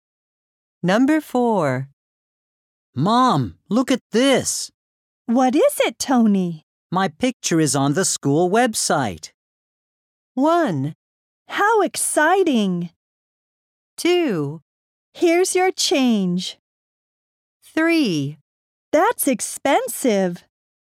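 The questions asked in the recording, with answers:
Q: My picture is on the school website.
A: 1: How exciting.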